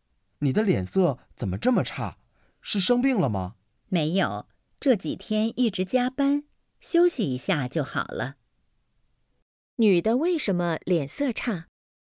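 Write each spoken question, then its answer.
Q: 女的为什么脸色差?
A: 这几天一直加班,太累了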